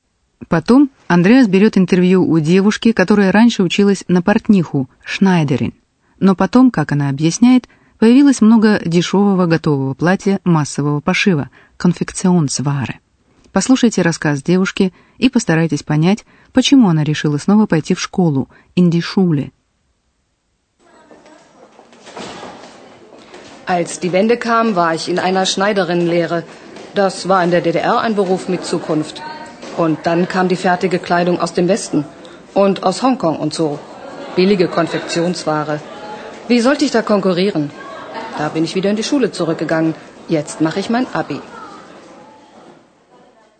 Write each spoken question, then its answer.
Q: Послушайте рассказ девушки и постарайтесь понять, почему она решила снова пойти в школу, Индишуле.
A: Девушка поняла, что она не сможет выдержать конкуренцию с дешевой одеждой массового пошива.